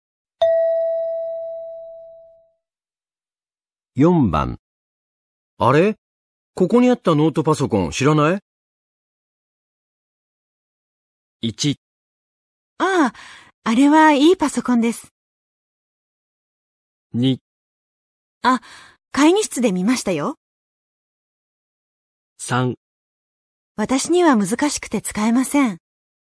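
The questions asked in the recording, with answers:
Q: あれ?ここにあったノートパソコン知らない?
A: 2: あ、会議室で見ましたよ。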